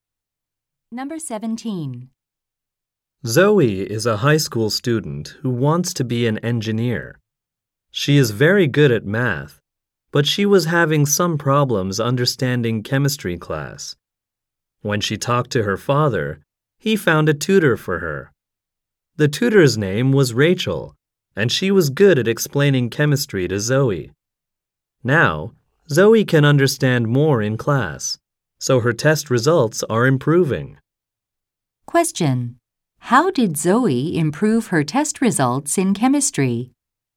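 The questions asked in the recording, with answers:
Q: How did Zoe improve her test results in chemistry?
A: She got help from a tutor, Rachel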